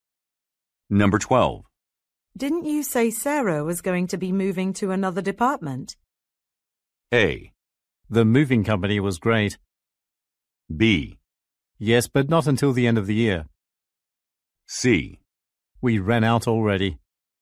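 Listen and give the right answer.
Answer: B: Yes, but not until the end of the year.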